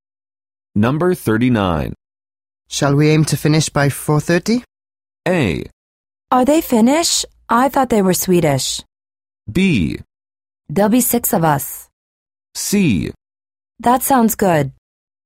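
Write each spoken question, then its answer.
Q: Shall we aim to finish by 4:30?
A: C: That sounds good.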